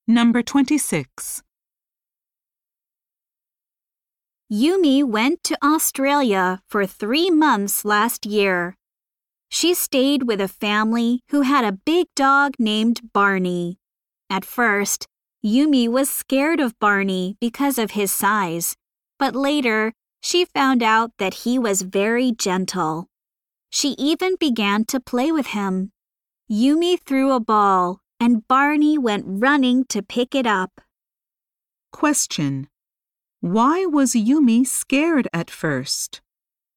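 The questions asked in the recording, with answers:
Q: Why was Yumi scared at first?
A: Because Barney was a big dog.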